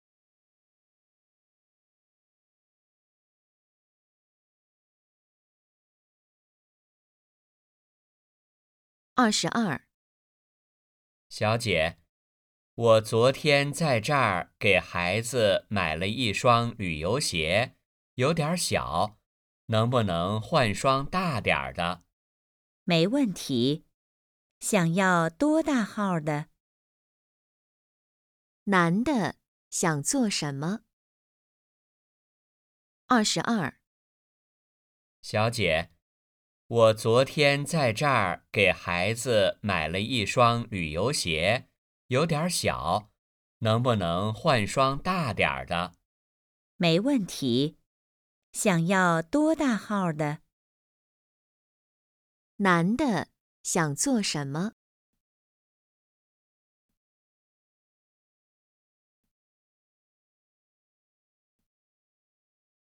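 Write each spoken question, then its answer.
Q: 男的想做什么?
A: 换一双大点的鞋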